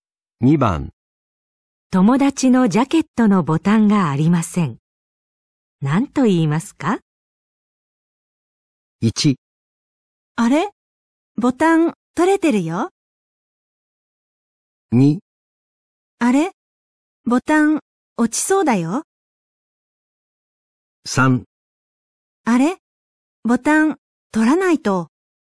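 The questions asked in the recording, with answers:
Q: 友達のジャケットのボタンがありません。何と言いますか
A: 1: あれ?ボタン取れてるよ。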